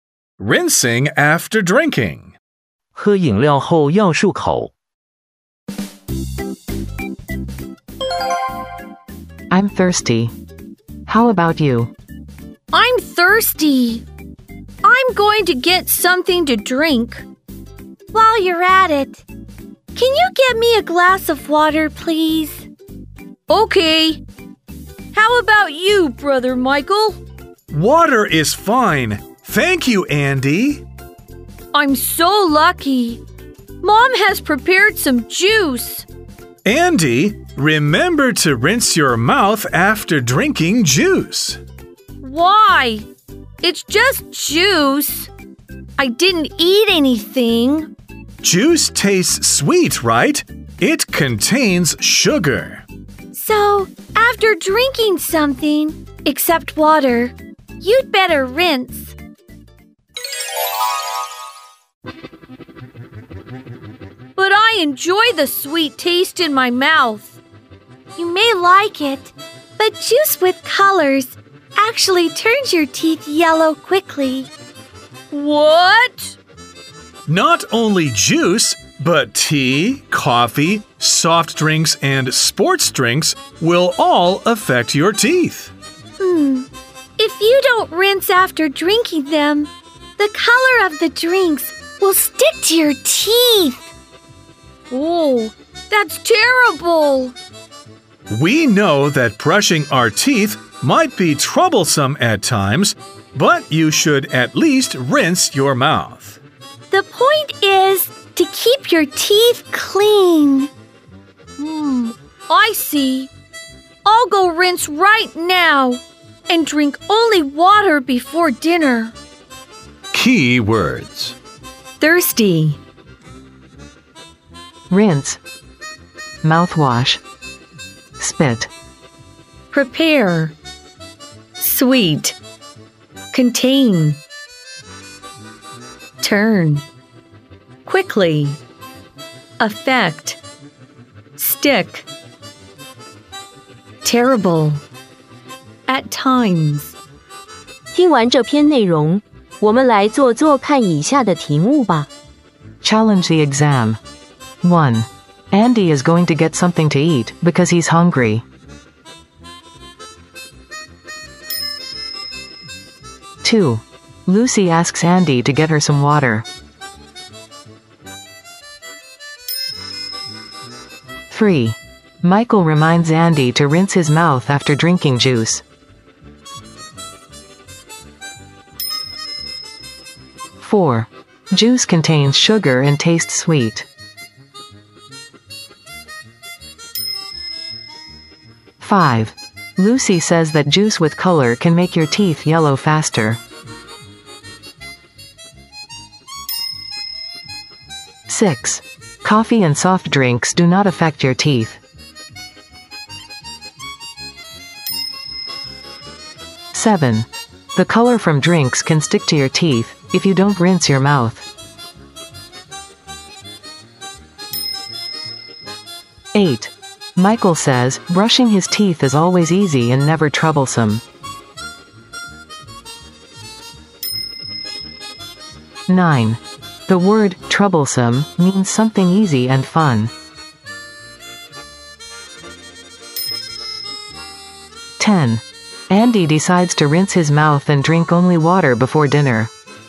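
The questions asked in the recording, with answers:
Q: Andy is going to get something to eat because he's hungry.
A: False

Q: Juice contains sugar and tastes sweet.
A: True

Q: Coffee and soft drinks do not affect your teeth.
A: False

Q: The color from drinks can stick to your teeth if you don't rinse your mouth.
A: True

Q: Michael says brushing his teeth is always easy and never troublesome.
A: False

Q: The word troublesome means something easy and fun.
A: False

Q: Andy decides to rinse his mouth and drink only water before dinner.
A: True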